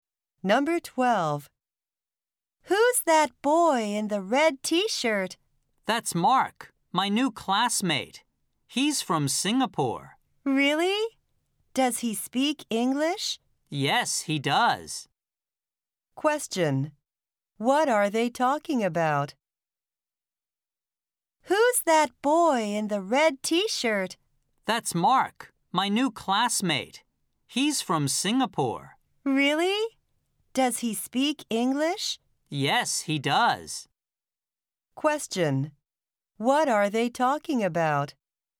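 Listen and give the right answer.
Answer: Mark, the boy in the red T-shirt, a new classmate from Singapore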